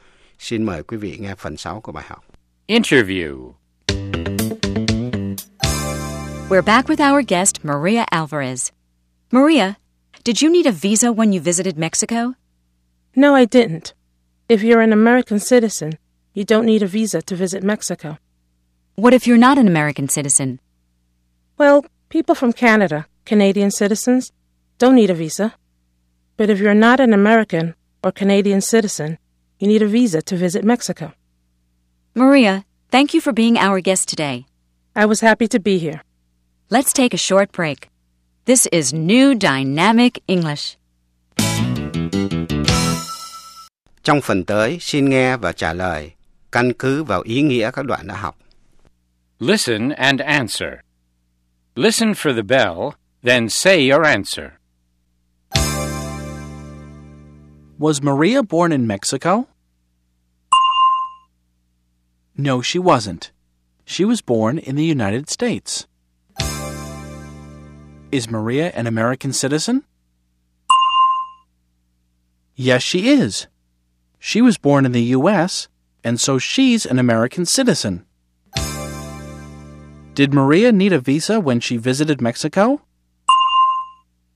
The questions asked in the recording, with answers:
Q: Did Maria need a visa when she visited Mexico?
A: No, she didn't. If you're an American citizen, you don't need a visa to visit Mexico.